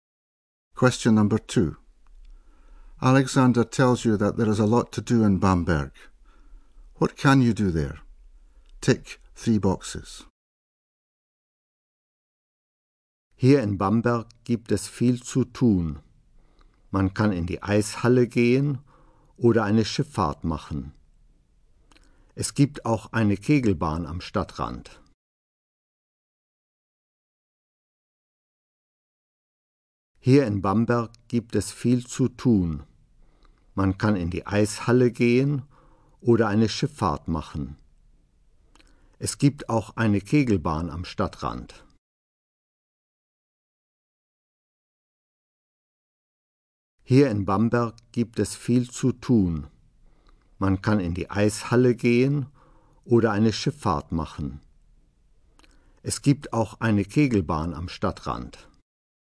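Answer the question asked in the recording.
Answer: Go ice skating, take a boat trip, go bowling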